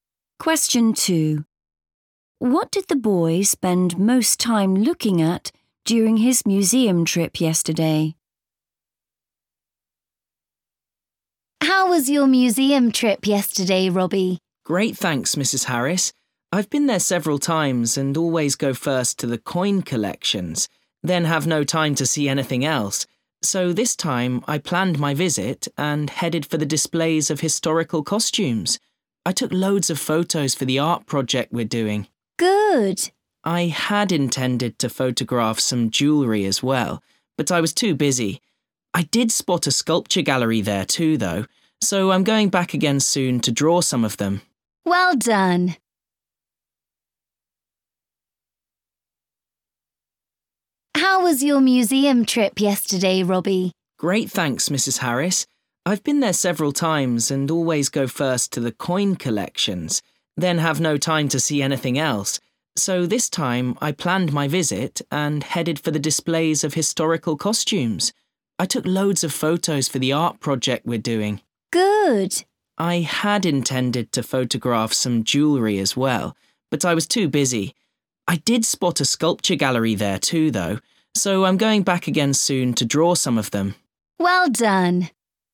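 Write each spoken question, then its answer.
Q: What did the boy spend most time looking at during his museum trip yesterday?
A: historical costumes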